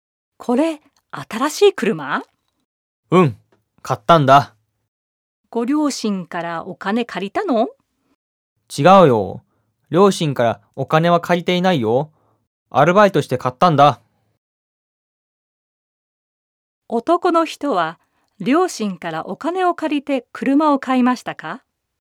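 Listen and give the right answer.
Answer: いいえ、両親からお金を借りないで、アルバイトして買いました。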